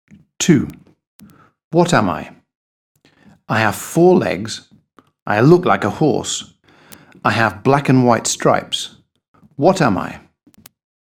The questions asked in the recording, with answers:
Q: What am I?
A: A zebra.